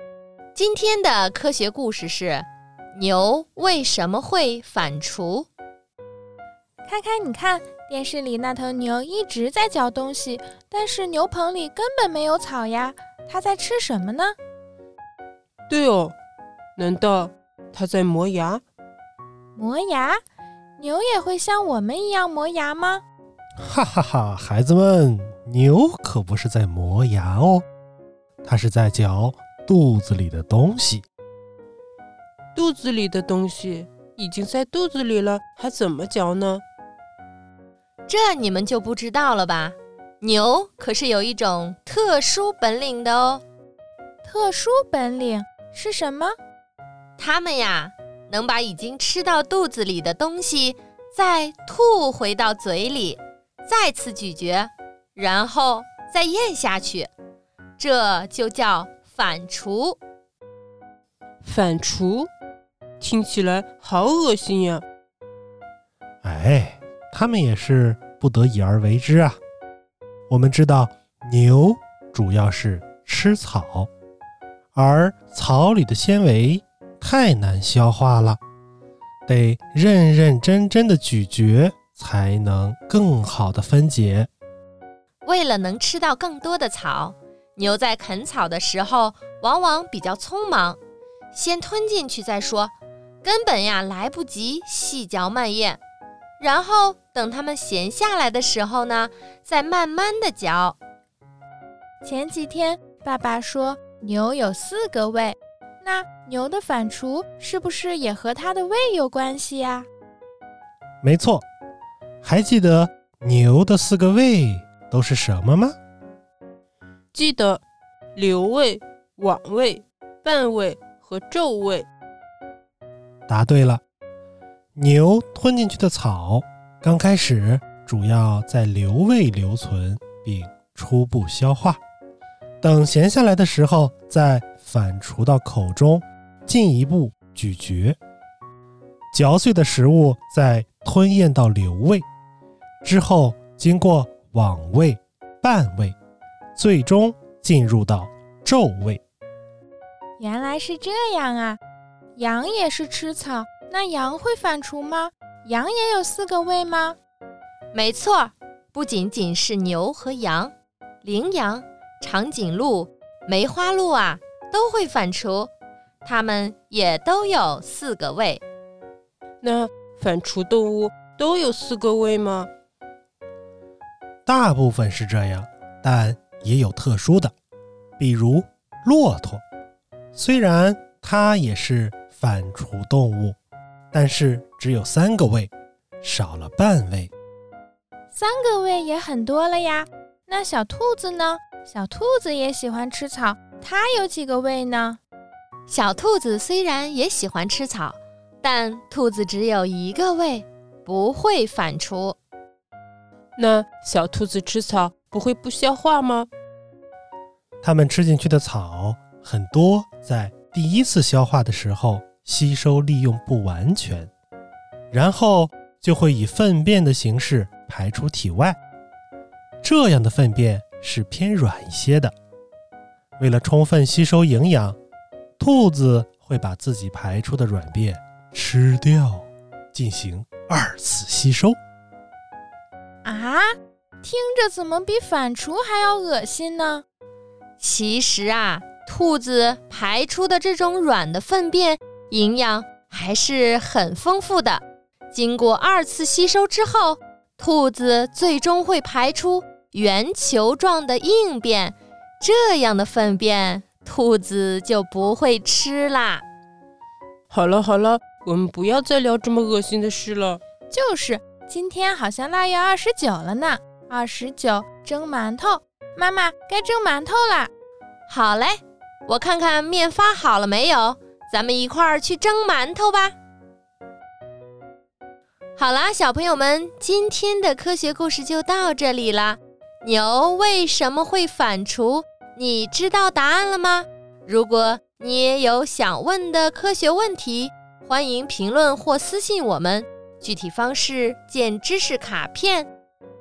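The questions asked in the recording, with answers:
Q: 牛为什么会反刍?你知道答案了吗?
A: 因为草里的纤维难消化,牛吃草时匆忙先吞下,闲下来再把食物吐回嘴里细嚼,帮助分解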